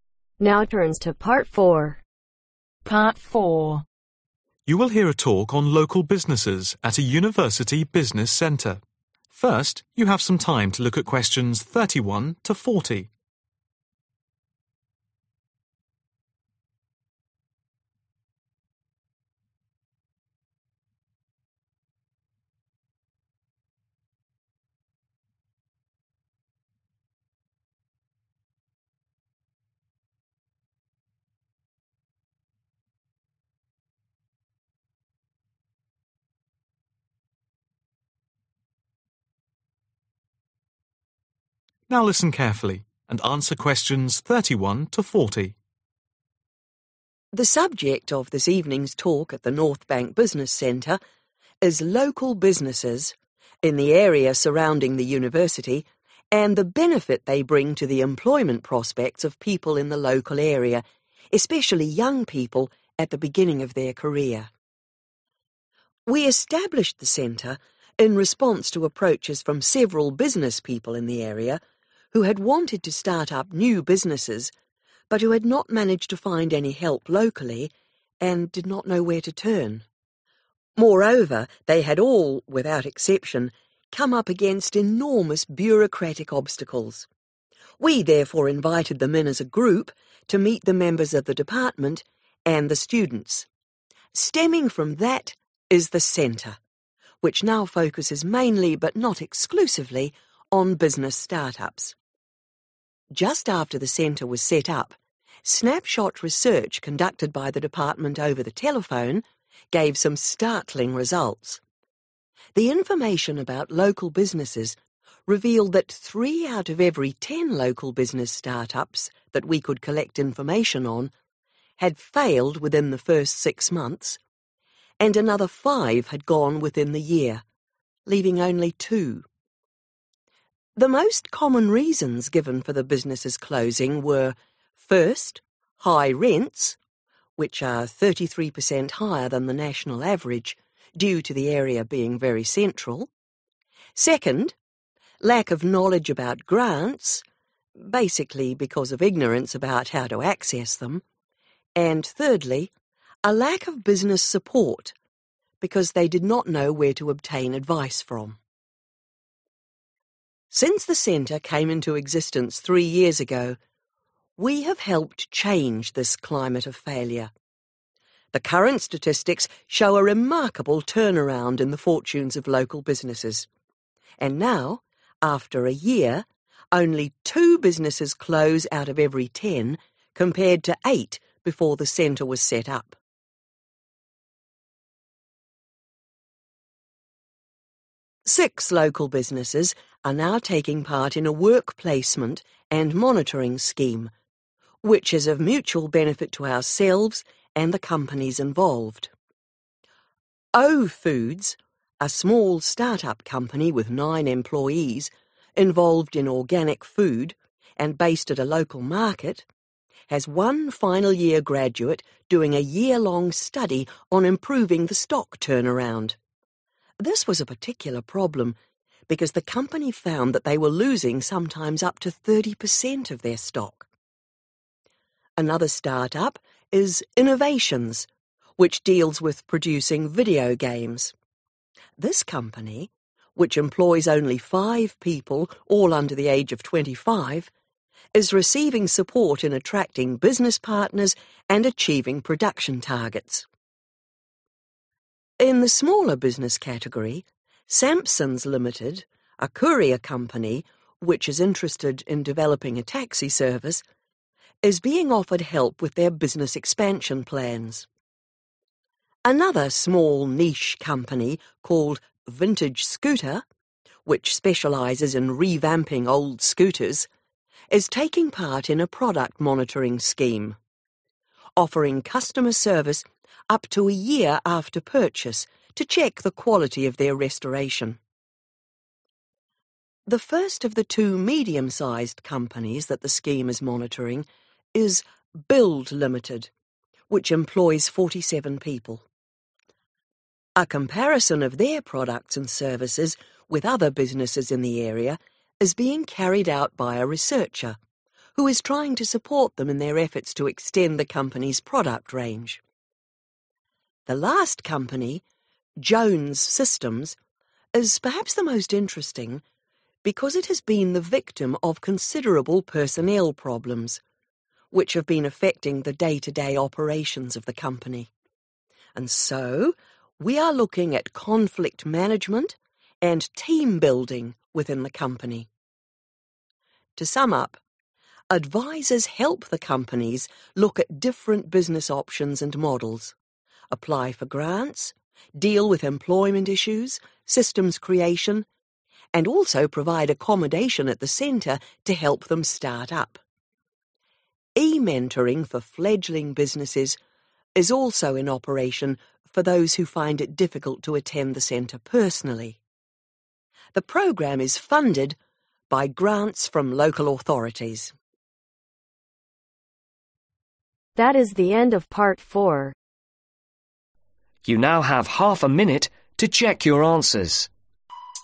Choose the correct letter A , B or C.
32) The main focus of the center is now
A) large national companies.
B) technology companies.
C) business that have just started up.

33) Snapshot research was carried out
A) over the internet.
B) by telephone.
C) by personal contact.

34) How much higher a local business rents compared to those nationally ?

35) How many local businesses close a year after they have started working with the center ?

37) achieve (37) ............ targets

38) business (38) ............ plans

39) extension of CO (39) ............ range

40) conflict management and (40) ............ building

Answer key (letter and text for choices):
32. C) business that have just started up.
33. B) by telephone.
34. 33
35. 2
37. production
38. expansion
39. product
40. team